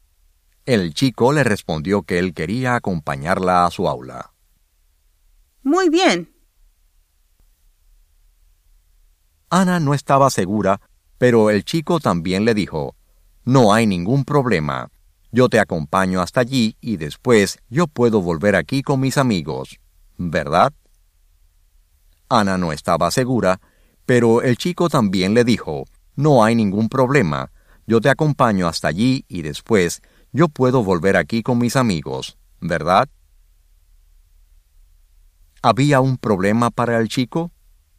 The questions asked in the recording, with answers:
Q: ¿Había un problema para el chico?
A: No, no había ningún problema para el chico.